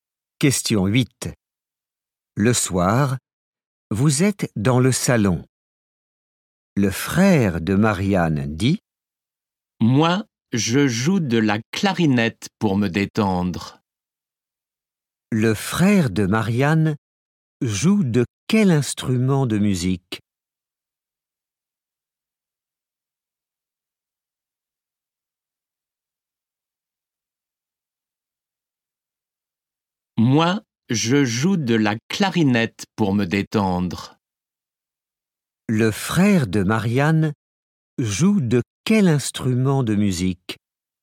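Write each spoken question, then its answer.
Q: Le frère de Marianne joue de quel instrument de musique?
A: De la clarinette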